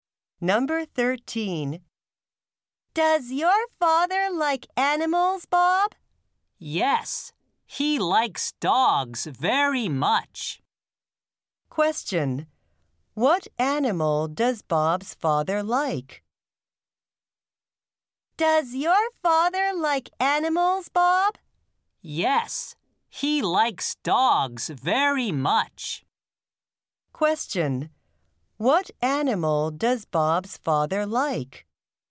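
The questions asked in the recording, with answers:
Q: What animal does Bob's father like?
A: Dogs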